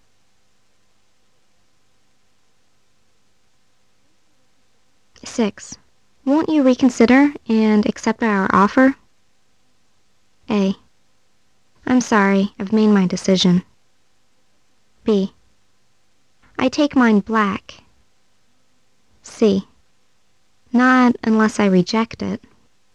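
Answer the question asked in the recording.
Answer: A: I'm sorry, I've made my decision.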